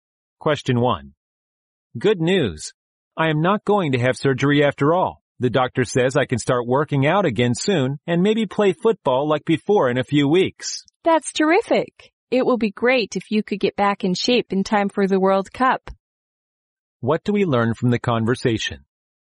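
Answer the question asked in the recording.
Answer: The man no longer needs surgery and may soon play football again.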